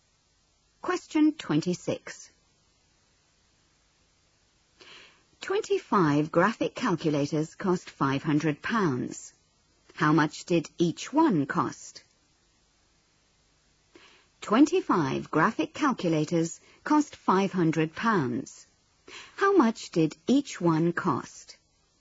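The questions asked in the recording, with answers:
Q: How much did each one cost?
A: £20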